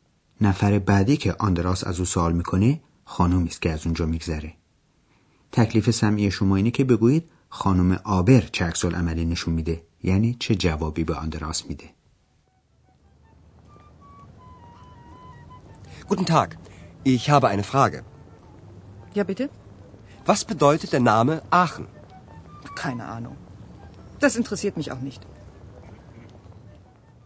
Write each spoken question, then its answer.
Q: تکلیف سمعی شما اینه که بگویید خانم آبر چه عکس عملی نشون میده یعنی چه جوابی به آندراس میده.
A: آندراس باز هم بدشانسی آورد چون که خانم آبر میگه اطلاعی ندارم.